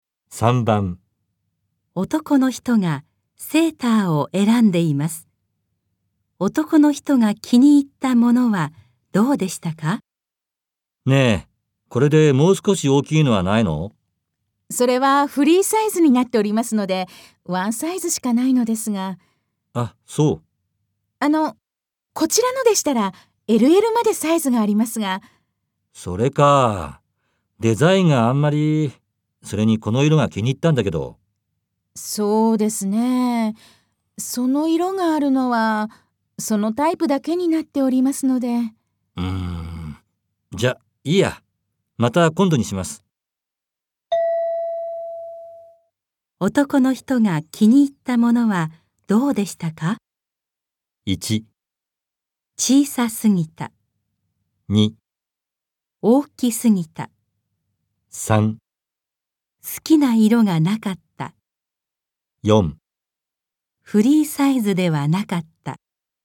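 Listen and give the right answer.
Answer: 1: 小さすぎた。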